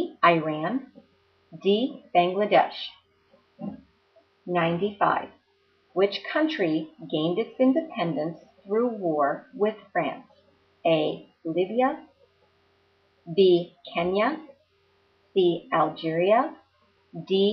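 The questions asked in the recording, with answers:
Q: Which country gained its independence through war with France?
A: C: Algeria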